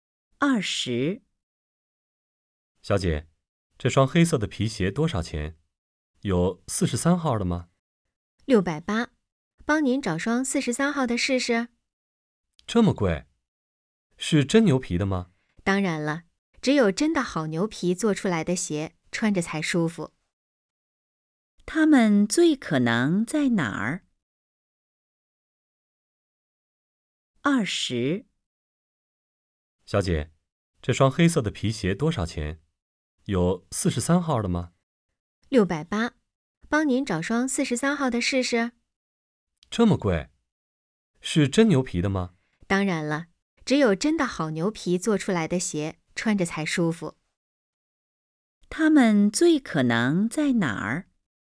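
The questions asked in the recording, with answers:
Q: 他们最可能在哪儿?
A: 鞋店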